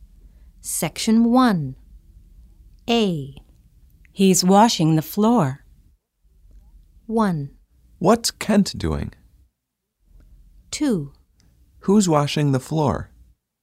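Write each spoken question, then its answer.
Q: He's washing the floor.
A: 1: What's Kent doing?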